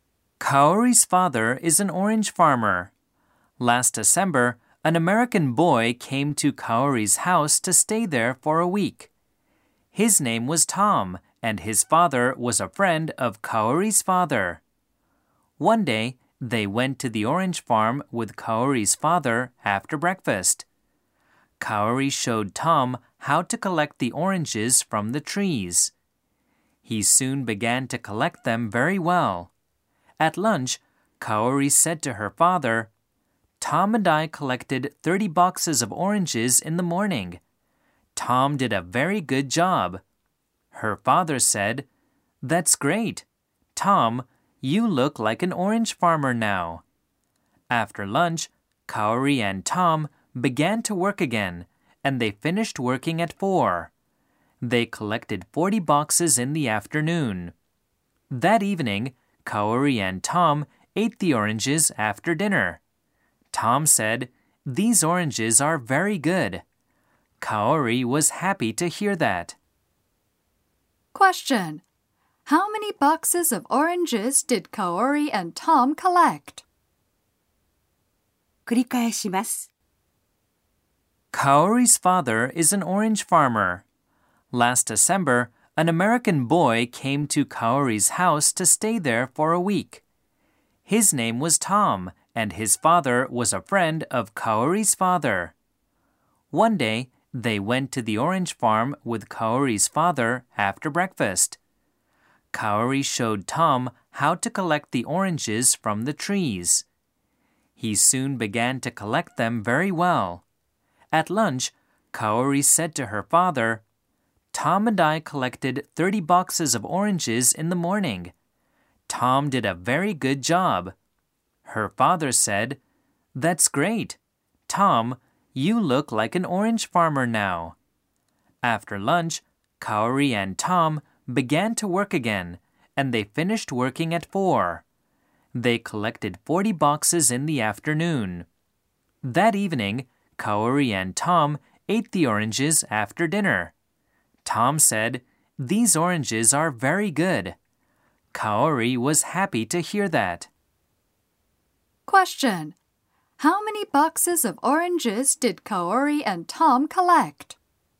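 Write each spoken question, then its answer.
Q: How many boxes of oranges did Kaori and Tom collect?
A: 70 boxes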